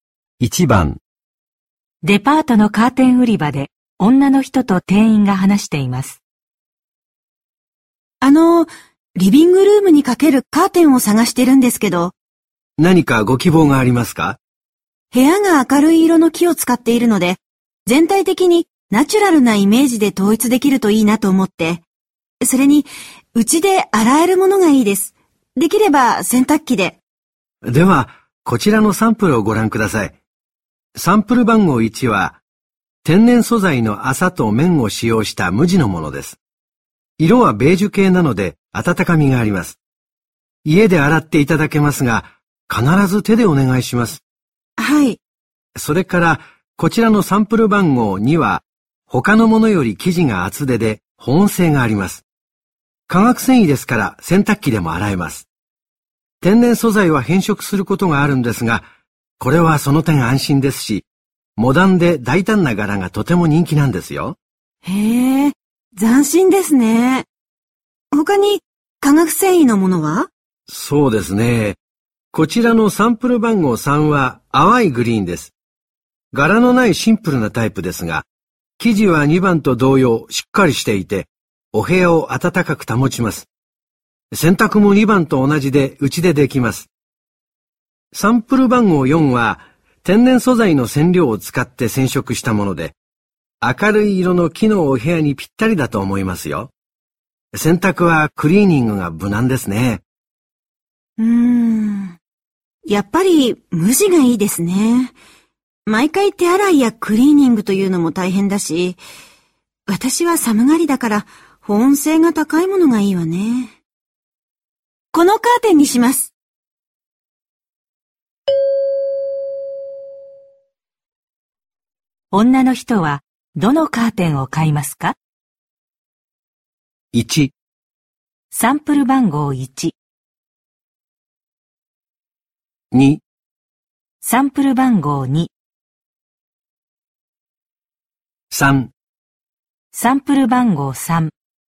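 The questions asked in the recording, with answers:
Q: 女の人はどのカーテンを買いますか?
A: 3: サンプル番号3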